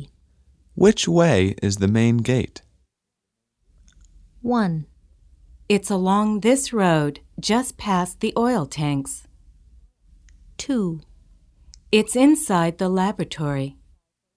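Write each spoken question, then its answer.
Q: Which way is the main gate?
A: 1: It's along this road, just past the oil tanks.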